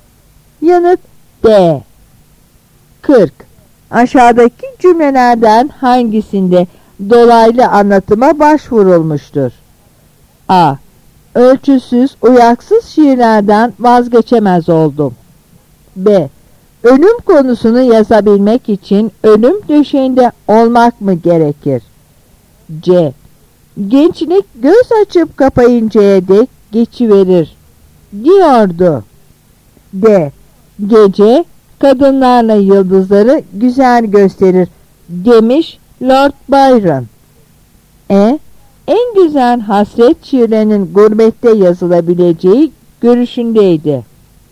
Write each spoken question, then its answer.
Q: Aşağıdaki cümlelerden hangisinde dolaylı anlatıma başvurulmuştur?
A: Yanıt E.